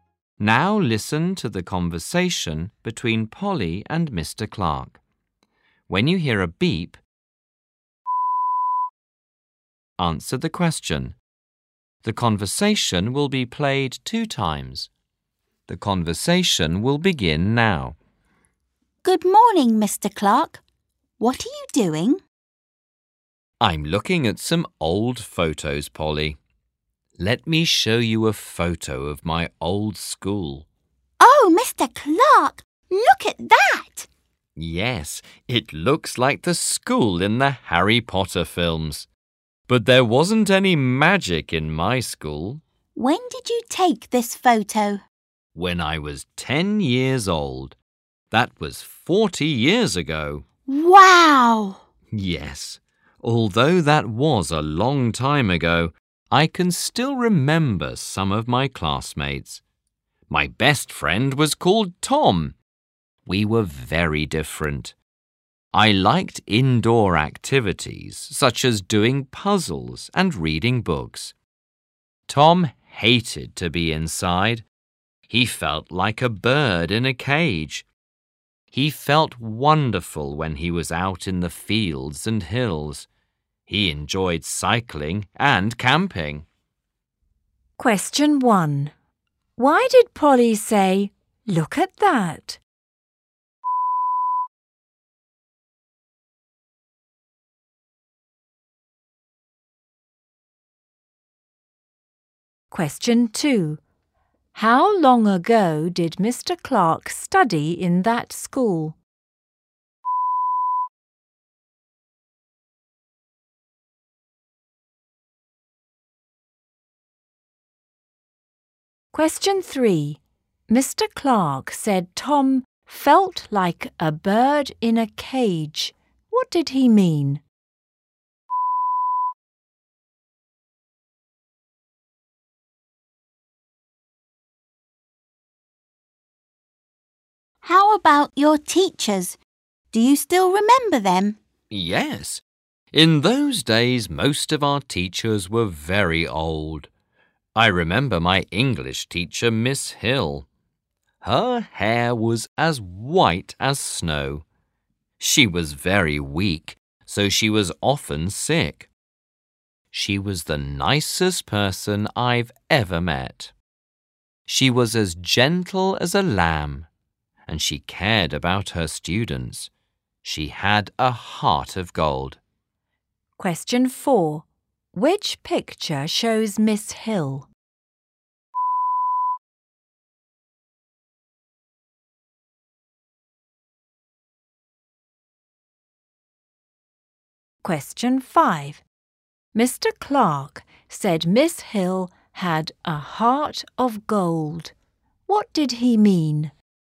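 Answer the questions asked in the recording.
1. The school in the photo looked like the school in the Harry Potter films.
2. 40 years ago
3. Tom hated being indoors and loved being outside.
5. She was very kind and cared about her students.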